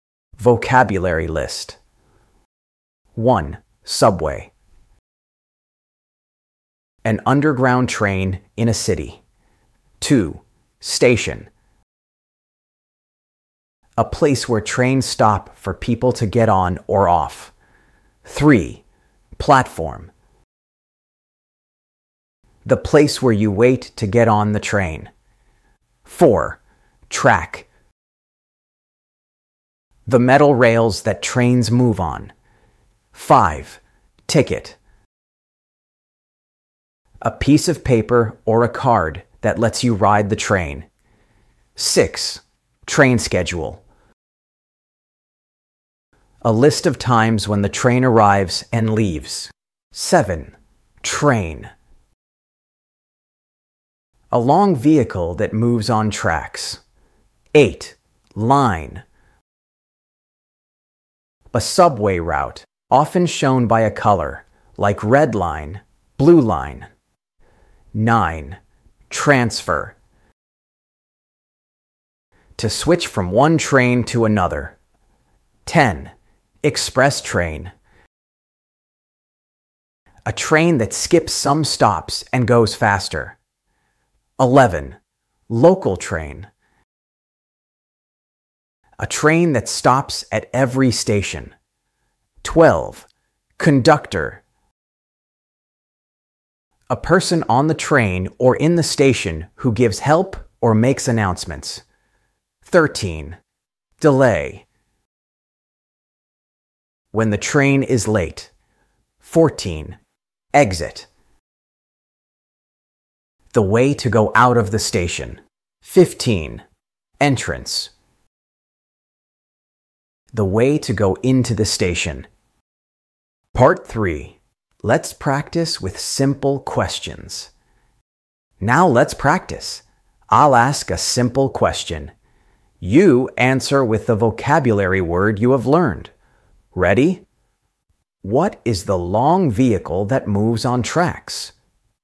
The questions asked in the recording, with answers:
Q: What is the long vehicle that moves on tracks?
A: Train. That's right. A train runs on tracks.